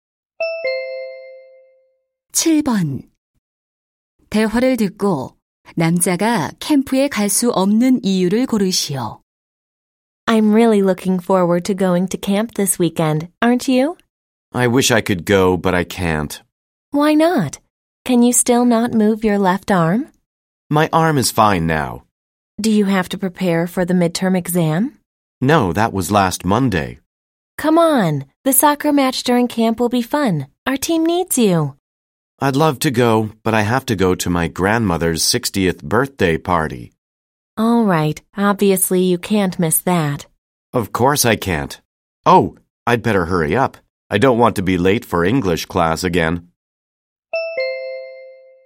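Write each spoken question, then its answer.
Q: 대화를 듣고 남자가 캠프에 갈 수 없는 이유를 고르시오.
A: 할머니의 60번째 생신 파티에 가야 해서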